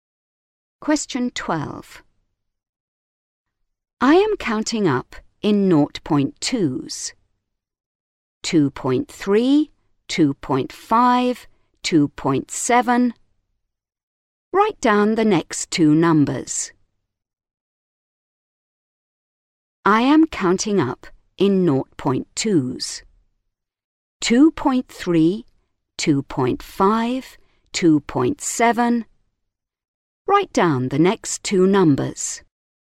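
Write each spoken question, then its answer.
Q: 2.3, 2.5, 2.7. Write down the next two numbers.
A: 2.9, 3.1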